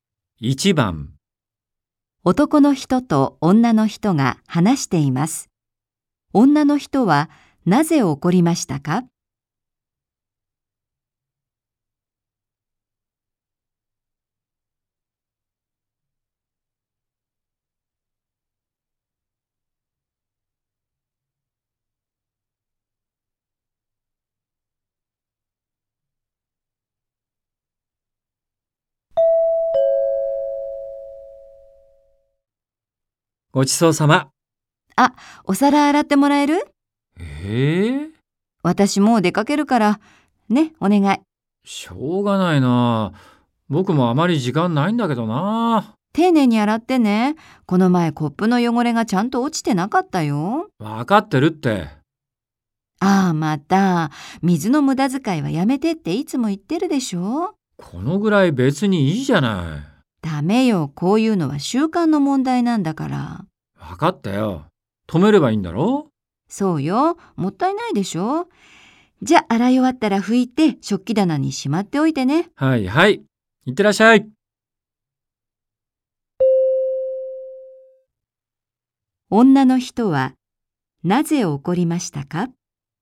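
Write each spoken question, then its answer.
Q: 女の人はなぜ怒りましたか?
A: 男の人が水を無駄遣いしたから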